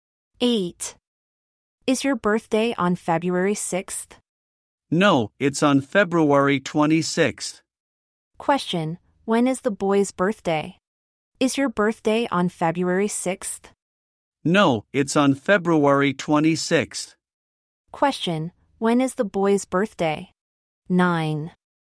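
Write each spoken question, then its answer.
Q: when is the boy's birthday?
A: February 26th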